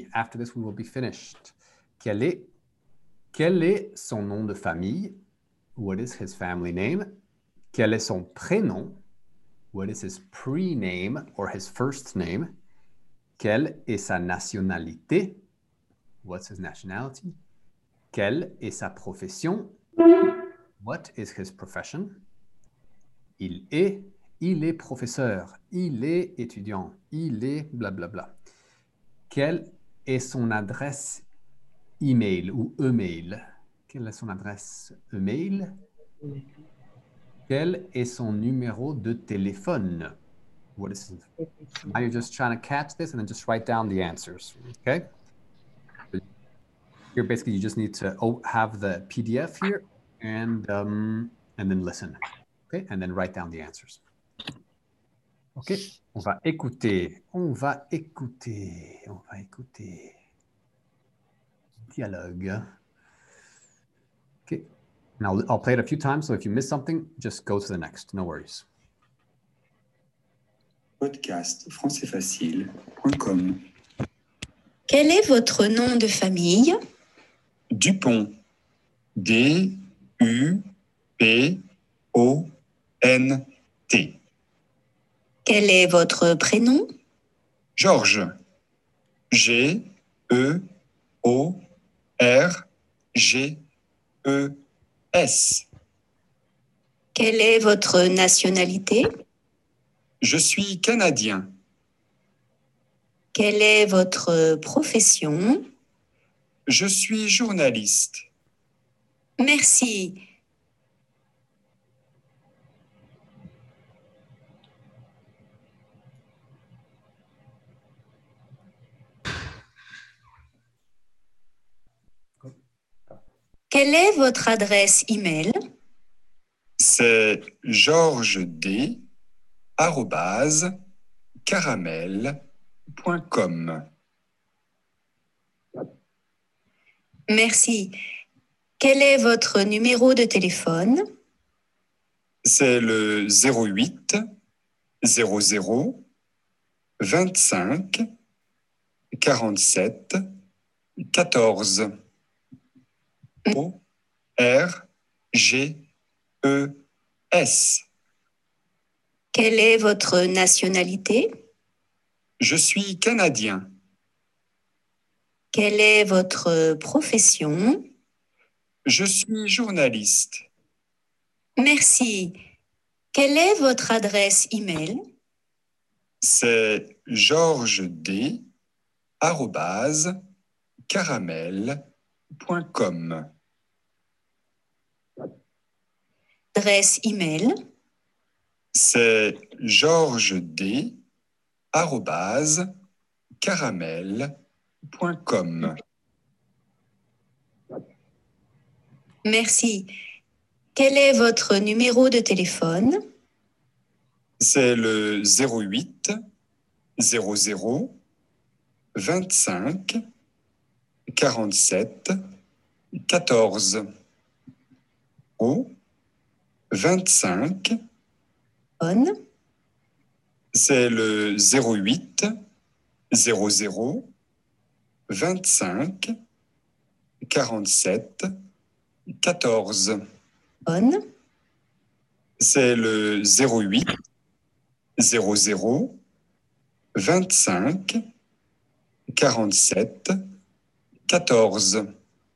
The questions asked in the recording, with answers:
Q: Quel est son nom de famille?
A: C'est Dupont.

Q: Quel est son prénom?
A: C'est George.

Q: Quelle est sa nationalité?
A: Il est canadien.

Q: Quelle est sa profession?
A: Il est journaliste.

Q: Quel est son numéro de téléphone?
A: 08, oui, 00, oui, 25, oui, 47, oui, 14, correct.